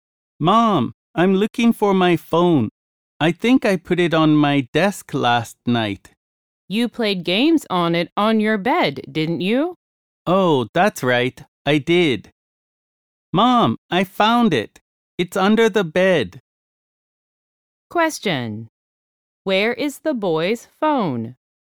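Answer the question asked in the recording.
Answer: Under the bed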